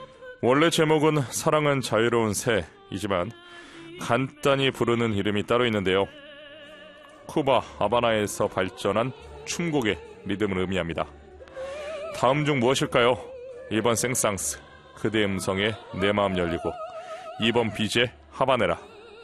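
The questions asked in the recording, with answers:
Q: 다음 중 무엇일까요? 1번 생상스, 그대 음성에 내 마음 열리고, 2번 비제 하바네라.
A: 2: 비제 하바네라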